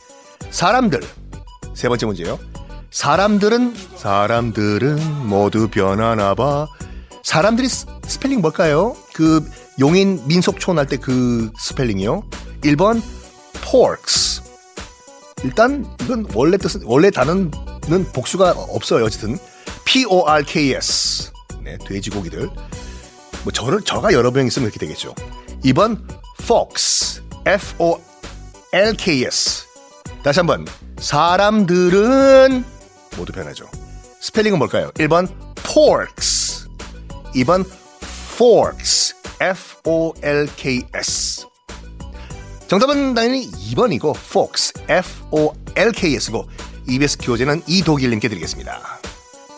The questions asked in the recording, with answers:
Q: 사람들이 스펠링 뭘까요?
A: 정답은 당연히 2번이고